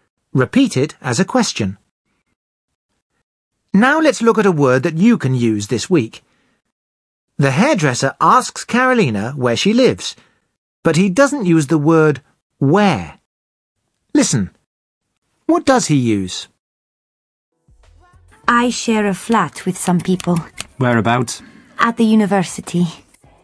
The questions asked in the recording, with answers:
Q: Listen, what does he use?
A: He says, whereabouts.